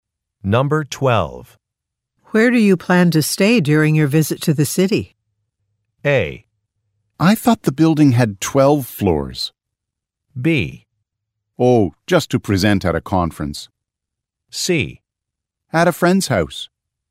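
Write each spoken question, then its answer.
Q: Where do you plan to stay during your visit to the city?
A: C: At a friend's house.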